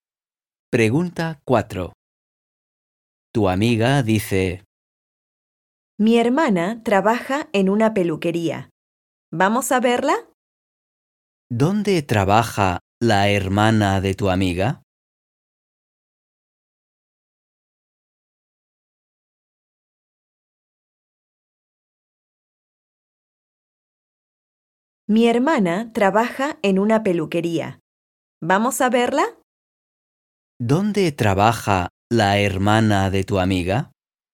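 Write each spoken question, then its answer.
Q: ¿Dónde trabaja la hermana de tu amiga?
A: En una peluquería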